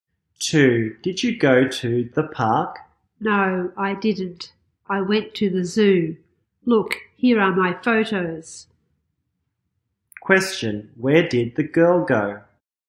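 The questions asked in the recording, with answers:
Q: where did the girl go?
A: To the zoo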